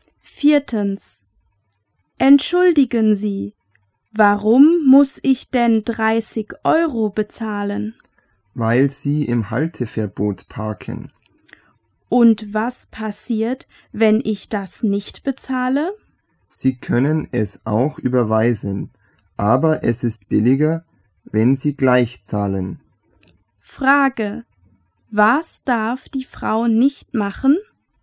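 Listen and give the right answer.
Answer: Im Halteverbot parken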